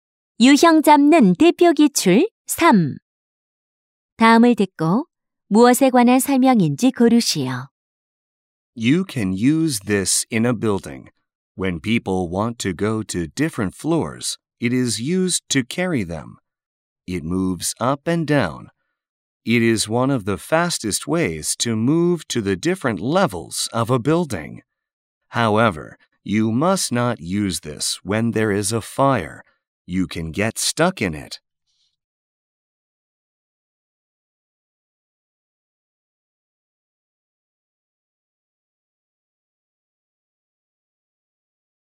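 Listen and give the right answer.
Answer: 엘리베이터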